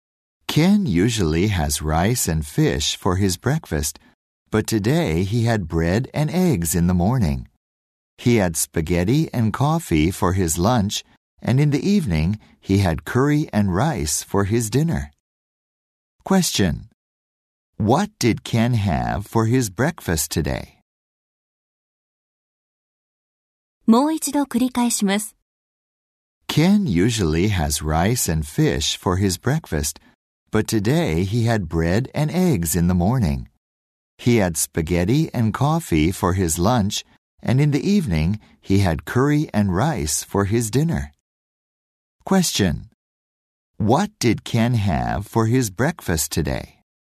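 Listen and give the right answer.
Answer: Bread and eggs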